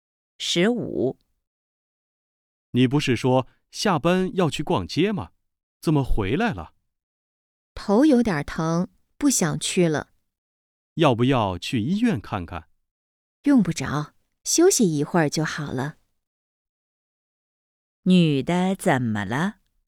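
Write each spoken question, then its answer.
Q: 女的怎么了?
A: 头有点疼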